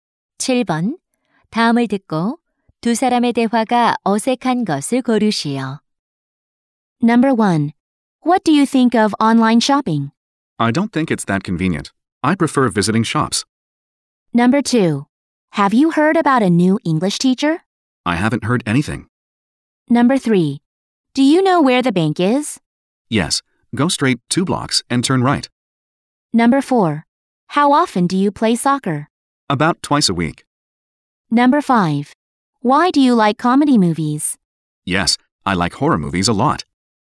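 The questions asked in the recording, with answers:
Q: 다음을 듣고 두 사람의 대화가 어색한 것을 고르시오.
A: 5번: Why do you like comedy movies? / Yes, I like horror movies a lot.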